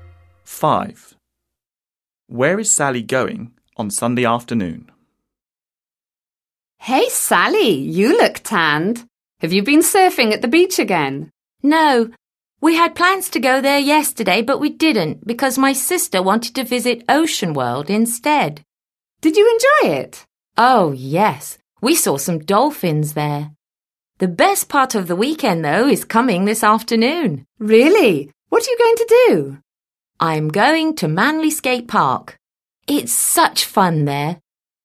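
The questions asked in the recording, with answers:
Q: Where is Sally going on Sunday afternoon?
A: Manly Skate Park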